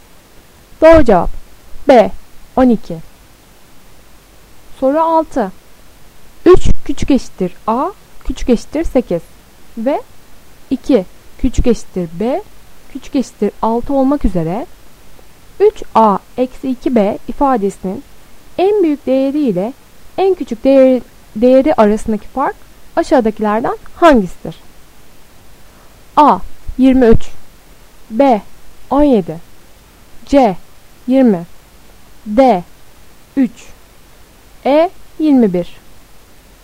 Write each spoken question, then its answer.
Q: 3 küçük eşittir A küçük eşittir 8 ve 2 küçük eşittir B küçük eşittir 6 olmak üzere 3A eksi 2B ifadesinin en büyük değeri ile en küçük değeri arasındaki fark aşağıdakilerden hangisidir?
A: Doğru cevap A 23.